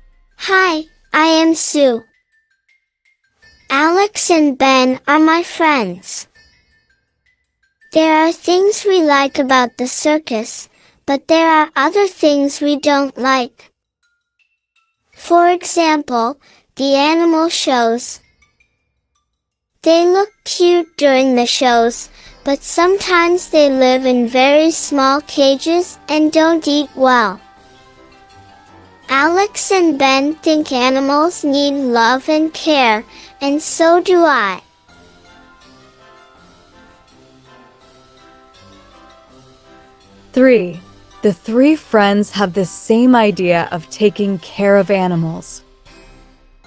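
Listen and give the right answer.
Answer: True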